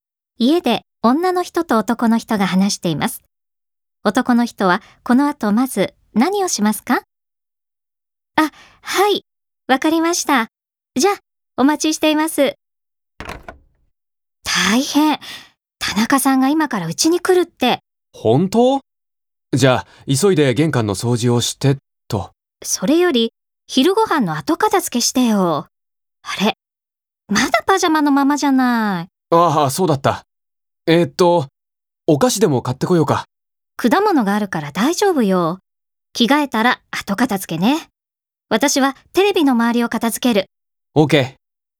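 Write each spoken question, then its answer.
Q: 男の人はこの後まず何をしますか?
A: 着替える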